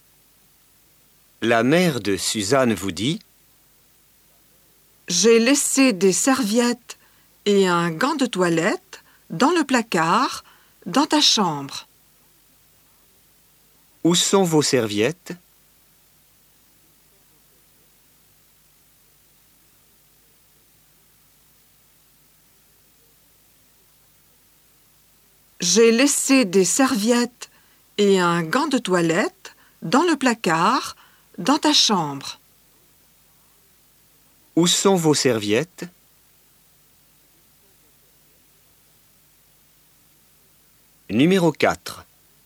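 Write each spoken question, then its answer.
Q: Où sont vos serviettes?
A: Dans le placard, dans la chambre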